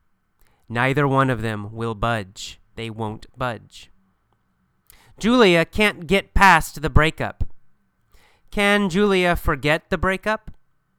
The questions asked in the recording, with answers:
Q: Can Julia forget the breakup?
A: No, she can't forget the breakup.